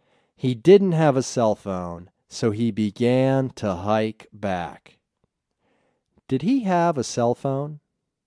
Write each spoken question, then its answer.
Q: Did he have a cell phone?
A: No, he didn't have a cell phone.